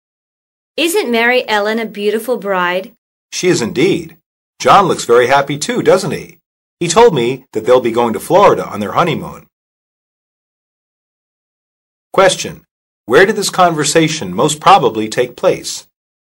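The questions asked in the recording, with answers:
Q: Where did this conversation most probably take place?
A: At a wedding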